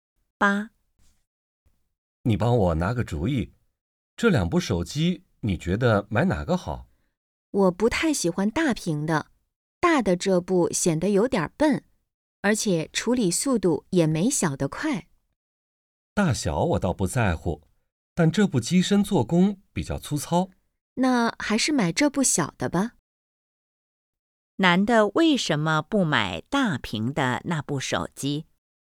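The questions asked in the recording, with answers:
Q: 男的为什么不买大屏的那部手机?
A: 显得笨,处理速度也没小的快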